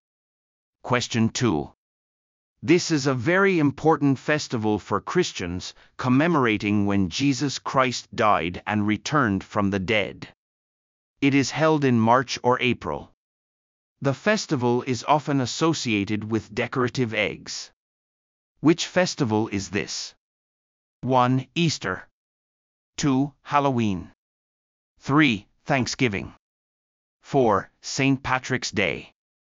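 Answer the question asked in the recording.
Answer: 1: Easter.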